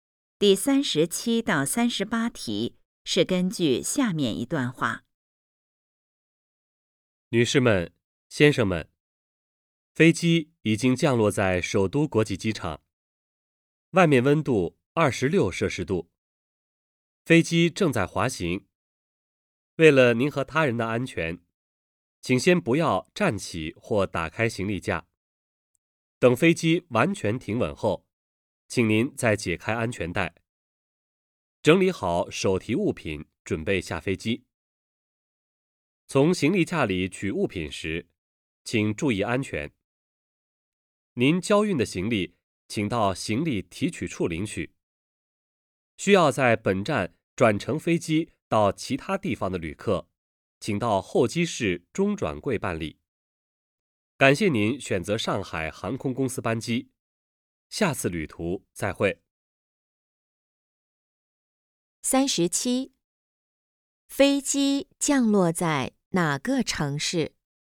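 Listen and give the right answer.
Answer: 北京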